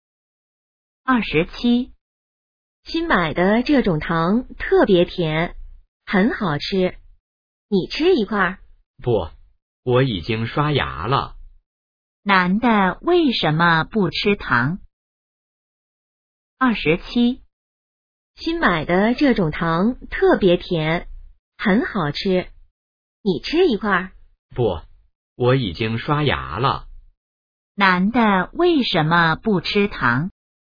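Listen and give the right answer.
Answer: 他已经刷牙了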